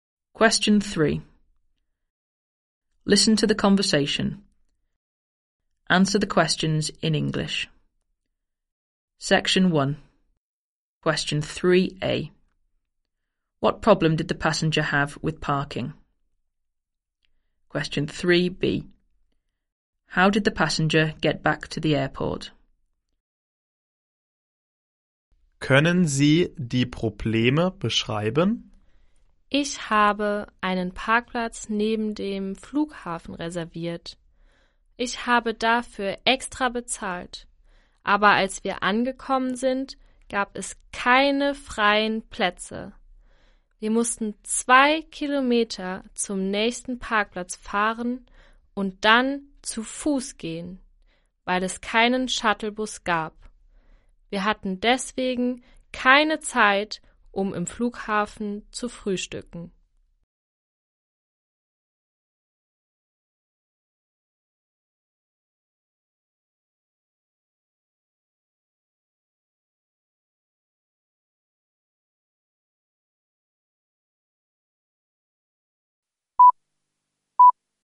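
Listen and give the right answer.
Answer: He had reserved and paid extra, but there were no free spaces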